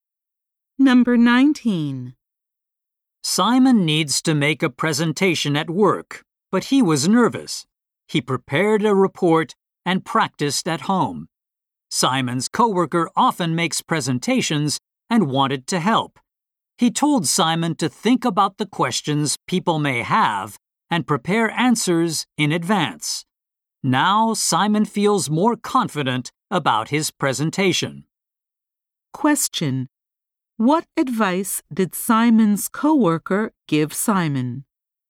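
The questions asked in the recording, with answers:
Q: What advice did Simon's coworker give Simon?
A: To think about people's possible questions and prepare answers in advance.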